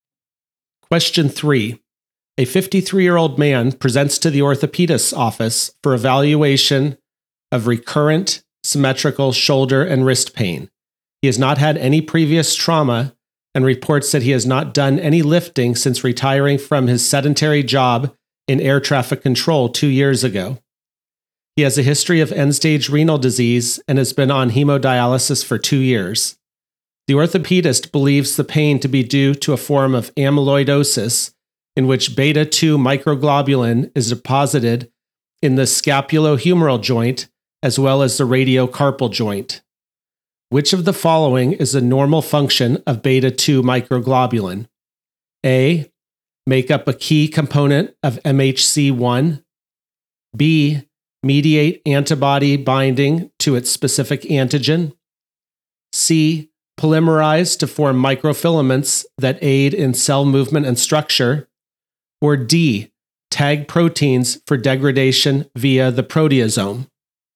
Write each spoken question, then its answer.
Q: Which of the following is a normal function of beta-2 microglobulin?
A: The correct answer is A, make up a key component of MHC1.